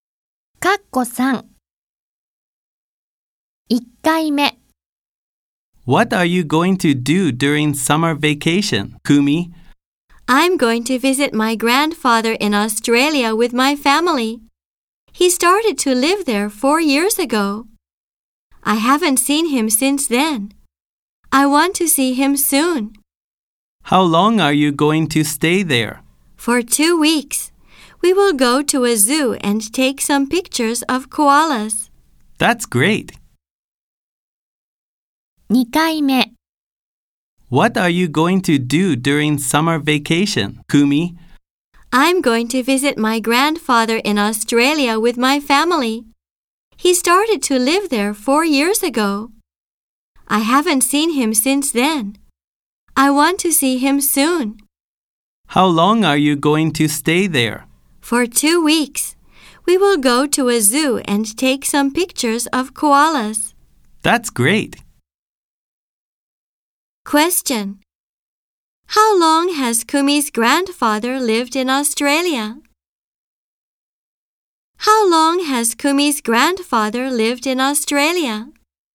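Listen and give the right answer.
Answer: For 4 years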